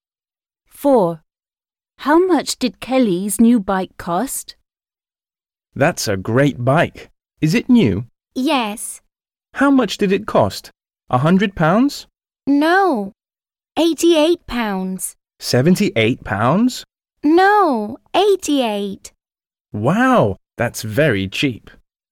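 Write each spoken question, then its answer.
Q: How much did Kelly's new bike cost?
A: £88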